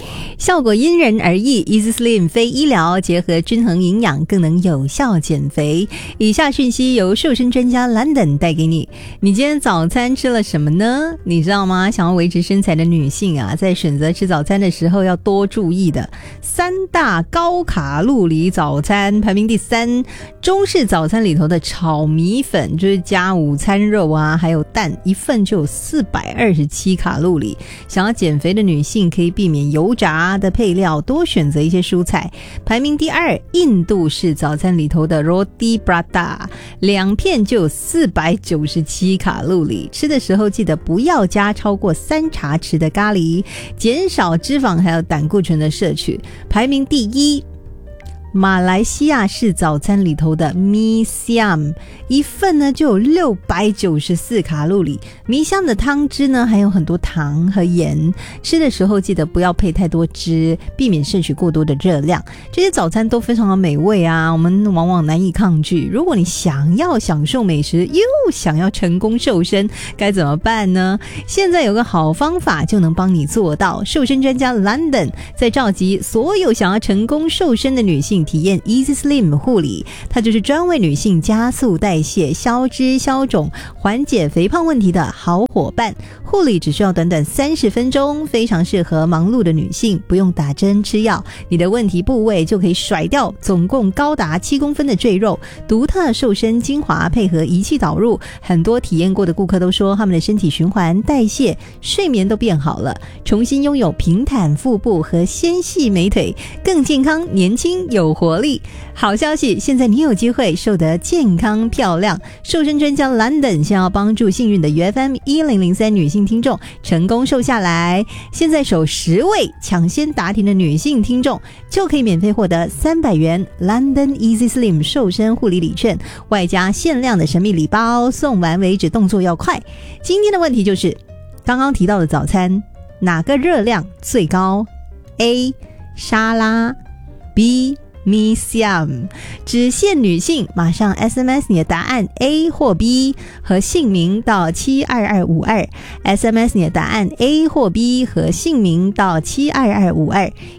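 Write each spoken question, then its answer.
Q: 今天的问题就是刚刚提到的早餐哪个热量最高? A 沙拉,B Mi Siam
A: B: Mi Siam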